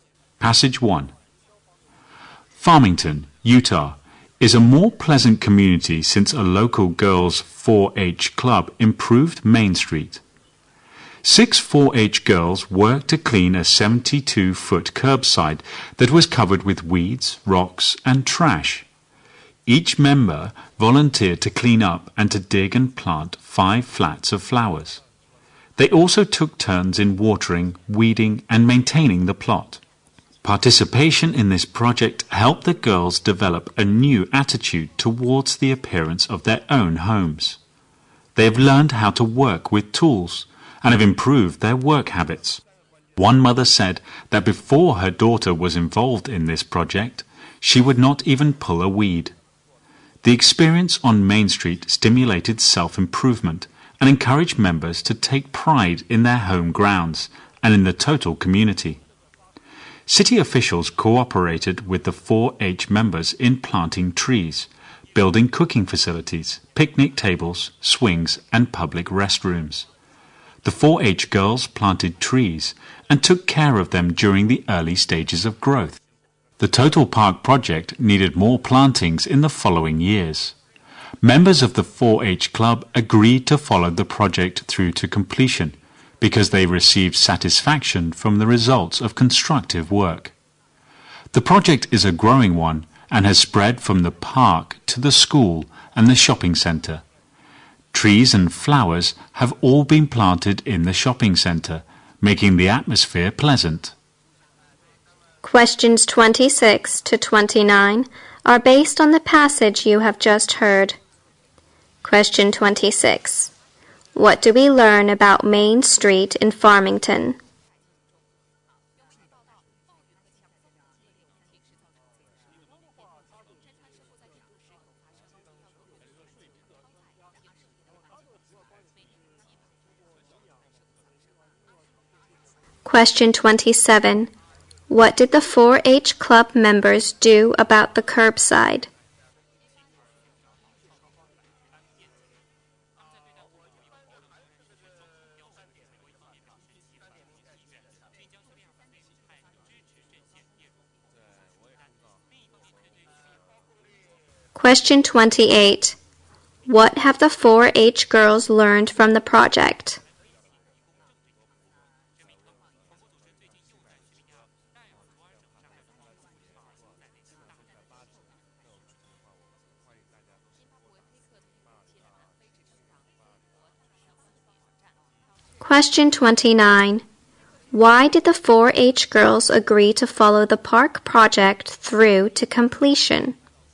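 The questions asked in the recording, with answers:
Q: What do we learn about Main Street in Farmington?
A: A local girls' 4-H club improved it and made it more pleasant.

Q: What did the 4-H Club members do about the curbside?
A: They cleaned it up and planted flowers there.

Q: What have the 4-H girls learned from the project?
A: How to work with tools; they also improved their work habits.

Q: Why did the 4-H girls agree to follow the park project through to completion?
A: Constructive work gave them satisfaction.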